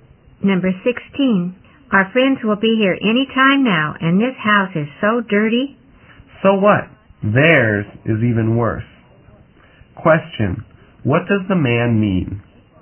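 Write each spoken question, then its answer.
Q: Question, what does the man mean?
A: Their friends' house is even dirtier, so it doesn't matter.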